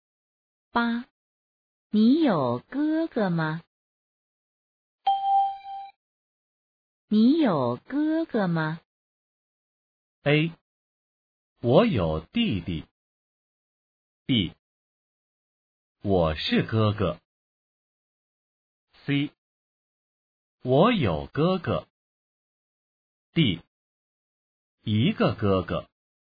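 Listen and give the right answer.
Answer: C: 我有哥哥。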